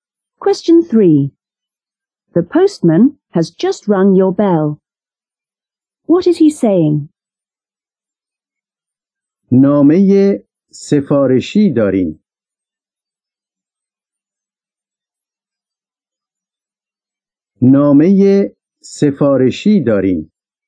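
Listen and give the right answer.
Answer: There is a registered letter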